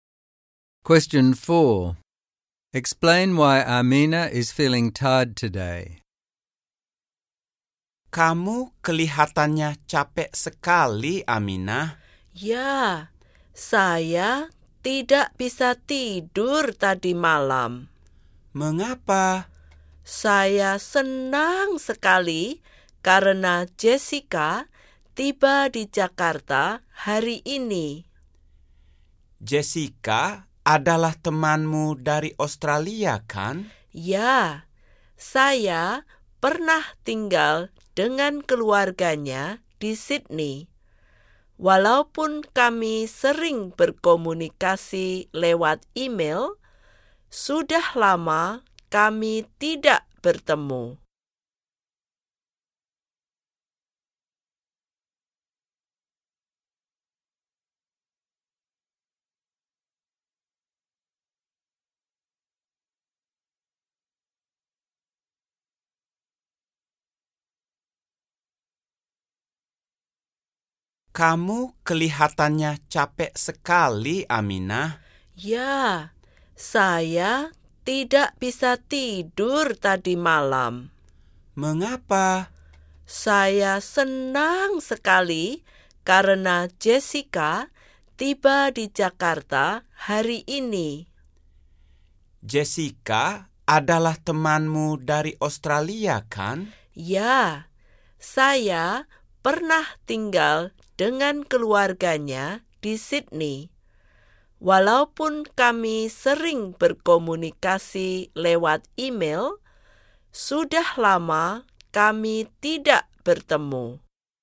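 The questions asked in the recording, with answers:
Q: Explain why Amina is feeling tired today.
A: She couldn't sleep last night because she was excited that her Australian friend Jessica, whom she hasn't seen for a long time, arrives today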